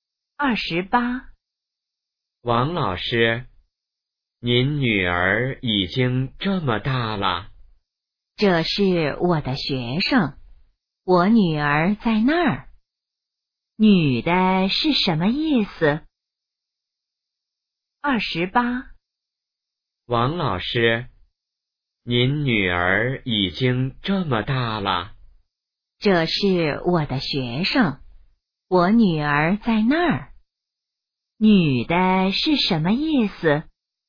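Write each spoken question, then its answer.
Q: 女的是什么意思?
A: 那是她的学生,不是她女儿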